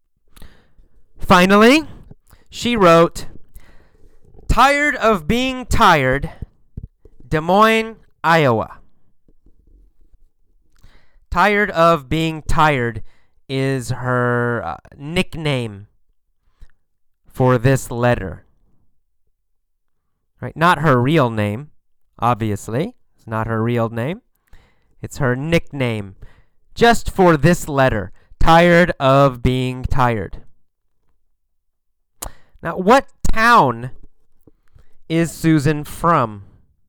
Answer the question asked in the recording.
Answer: Des Moines. She's from Des Moines.